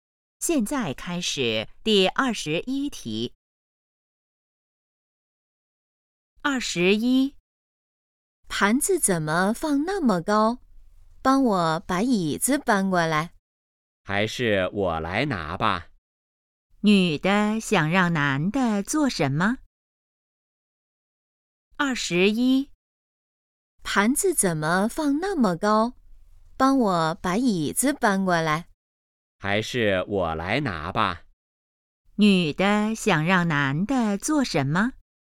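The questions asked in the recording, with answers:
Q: 女的想让男的做什么?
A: 搬椅子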